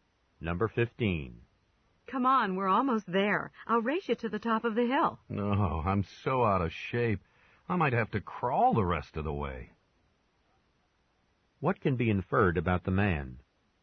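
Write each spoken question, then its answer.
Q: What can be inferred about the man?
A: He is out of shape and tired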